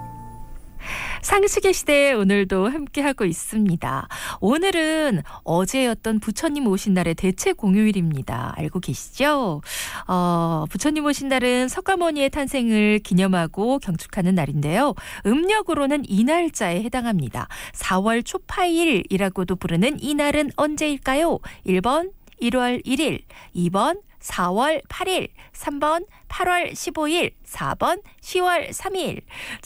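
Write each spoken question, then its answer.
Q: 4월 초파일이라고도 부르는 이 날은 언제일까요?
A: 2: 4월 8일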